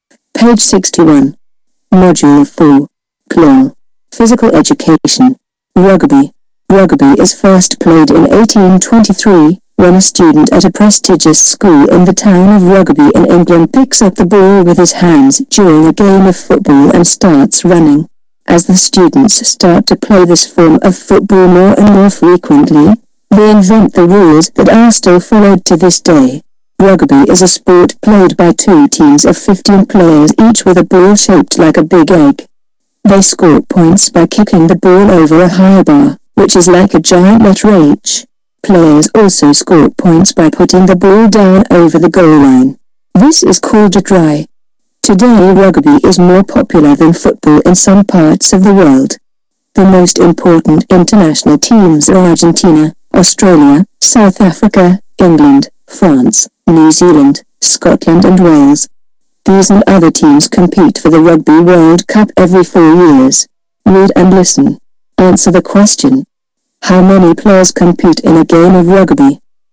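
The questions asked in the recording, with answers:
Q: How many players compete in a game of rugby?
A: 30 (two teams of 15)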